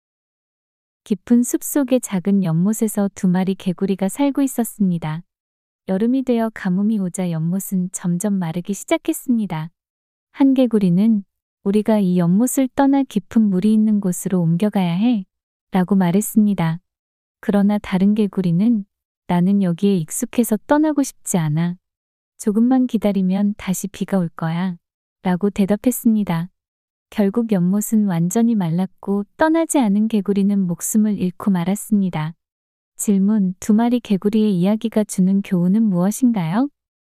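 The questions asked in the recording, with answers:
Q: 두 마리 개구리의 이야기가 주는 교훈은 무엇인가요?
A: 상황이 변하면 익숙함에 머물지 말고 변화에 맞춰 행동해야 한다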